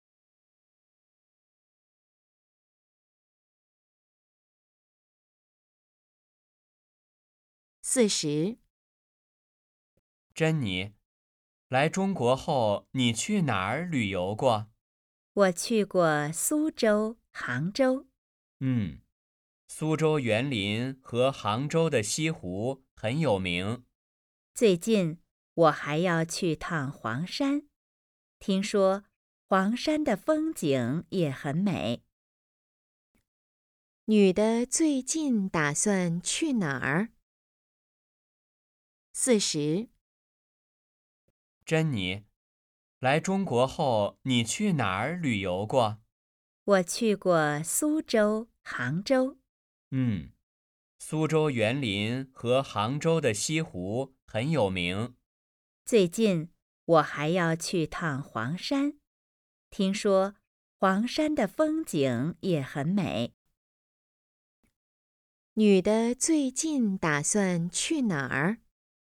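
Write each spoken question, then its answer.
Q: 女的最近打算去哪儿?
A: 黄山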